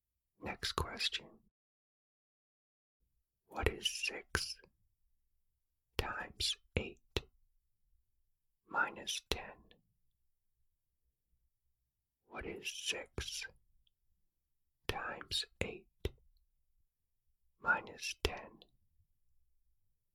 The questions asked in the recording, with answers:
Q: What is 6 times 8 minus 10?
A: The answer is 38.